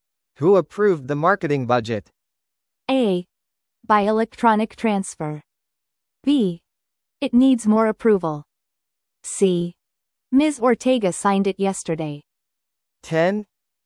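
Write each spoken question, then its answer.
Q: Who approved the marketing budget?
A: C: Ms. Ortega signed it yesterday.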